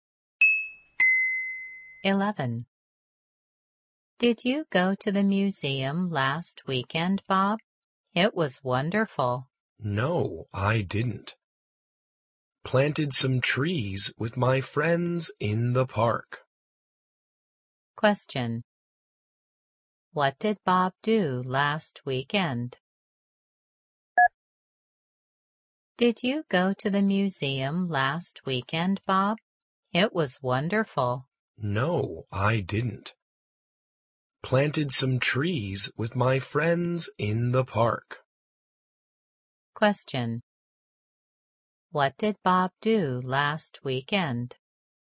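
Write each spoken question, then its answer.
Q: What did Bob do last weekend?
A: He planted some trees with his friends in the park.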